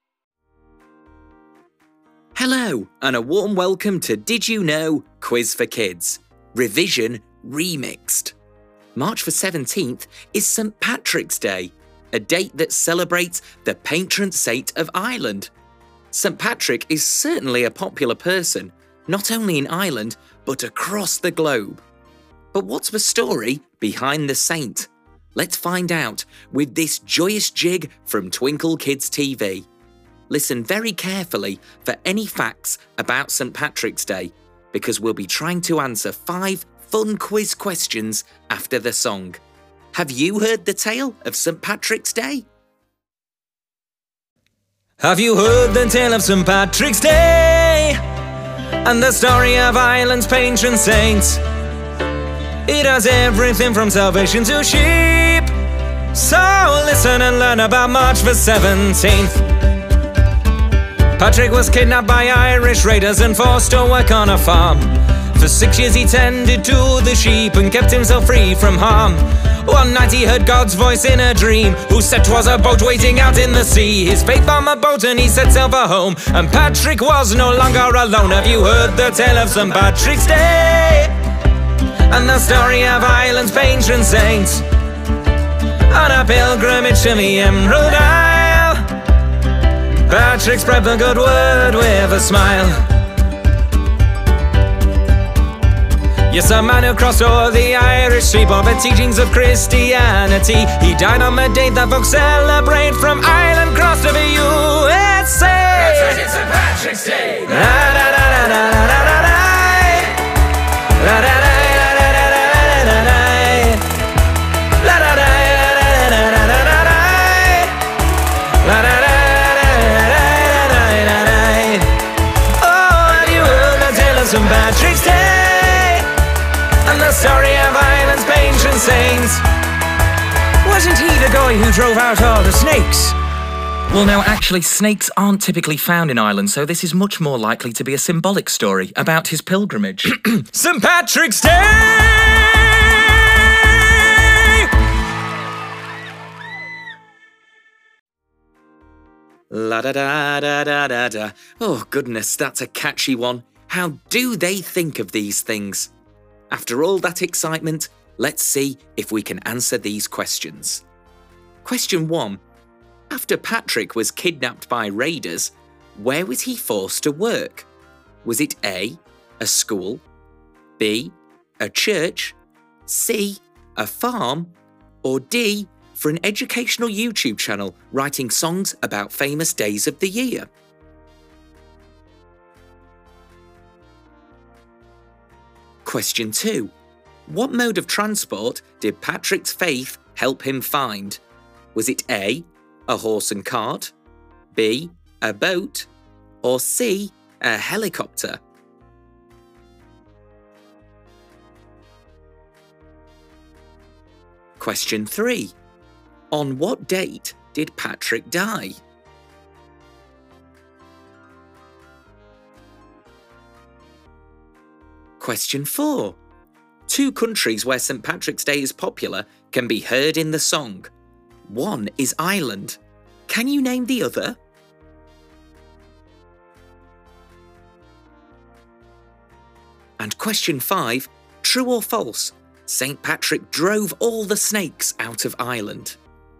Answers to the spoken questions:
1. So that leaves us with C, a farm.
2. The answer is B, a boat.
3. March the 17th is your answer.
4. But in our song, the answer you are looking for is the USA.
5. The answer is false.